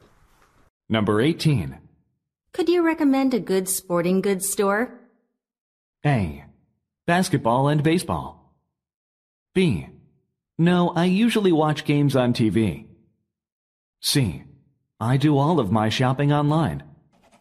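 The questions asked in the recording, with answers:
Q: Could you recommend a good sporting goods store?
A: C: I do all of my shopping online.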